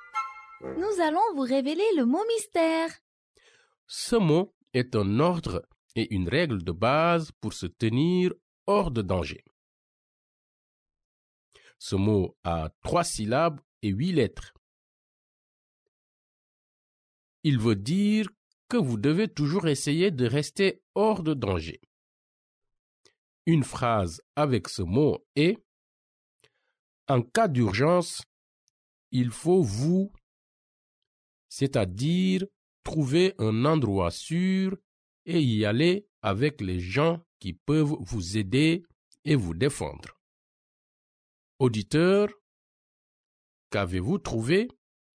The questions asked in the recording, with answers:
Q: Auditeur, qu'avez-vous trouvé?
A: Le mot mystère est protéger.